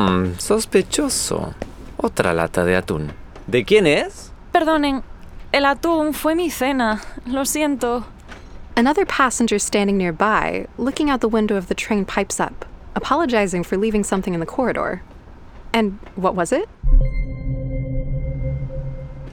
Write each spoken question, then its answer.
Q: And what was it?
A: Right. Una lata de atún. A can of tuna.